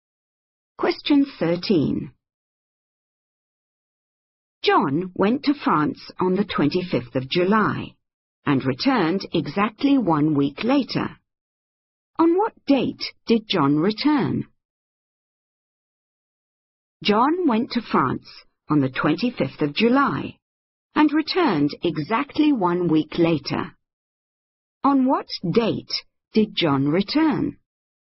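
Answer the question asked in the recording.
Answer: 1st of August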